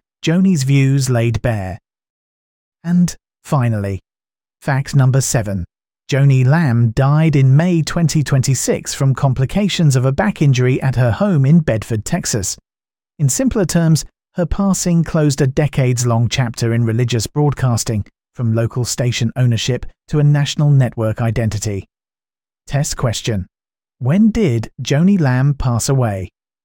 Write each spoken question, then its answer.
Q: When did Joni Lamb pass away?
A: Correct answer. May 2026.